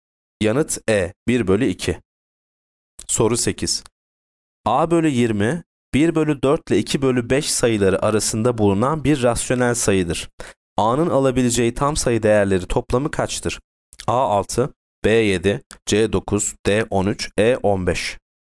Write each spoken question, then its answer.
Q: A'nın alabileceği tam sayı değerleri toplamı kaçtır?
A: Yanıt D 13.